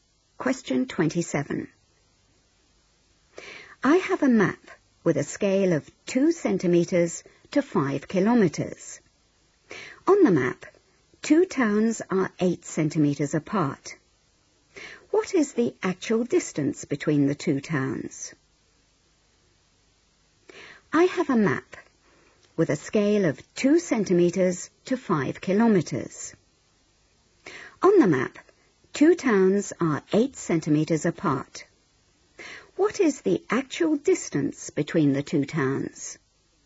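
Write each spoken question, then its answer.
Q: What is the actual distance between the two towns?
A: 20 km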